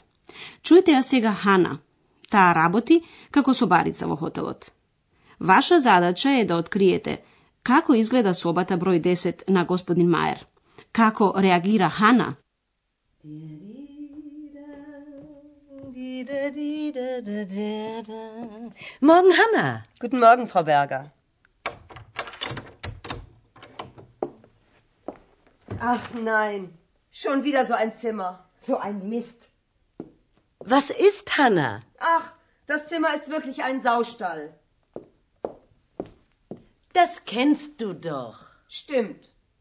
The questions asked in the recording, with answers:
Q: Ваша задача е да откриете како изгледа собата број 10 на господин Маер.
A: Hanna ja naođa sobata kako kočina i moš nenalutena.